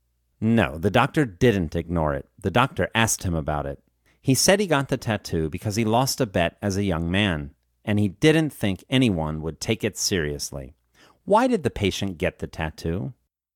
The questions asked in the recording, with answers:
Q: Why did the patient get the tattoo?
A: The patient got the tattoo because he lost a bet as a young man.